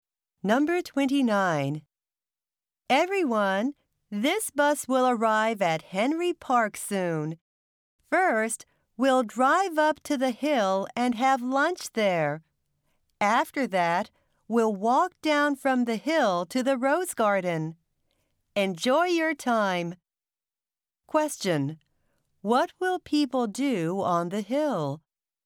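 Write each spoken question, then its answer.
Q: What will people do on the hill?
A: Have lunch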